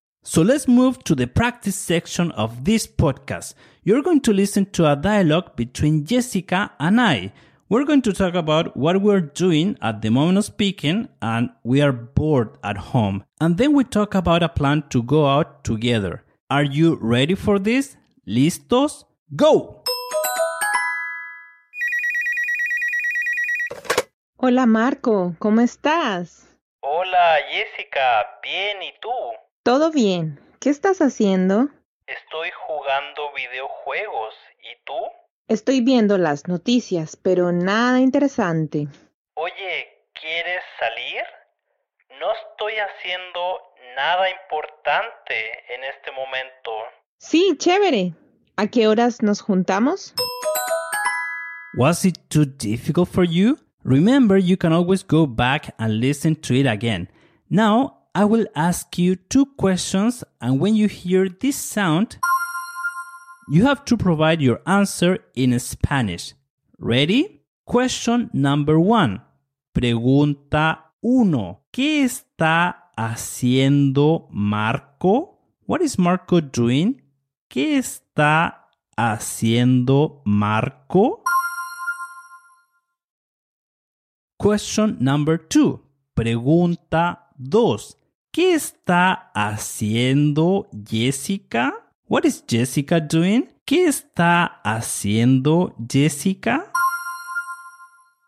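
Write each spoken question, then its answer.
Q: ¿Qué está haciendo Marco?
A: Está jugando videojuegos.

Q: ¿Qué está haciendo Jessica?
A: Está viendo las noticias.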